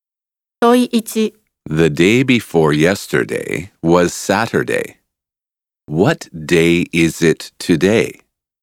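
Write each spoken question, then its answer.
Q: What day is it today?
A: Monday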